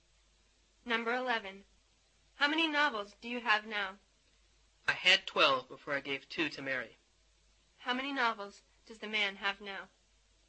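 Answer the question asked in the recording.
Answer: 10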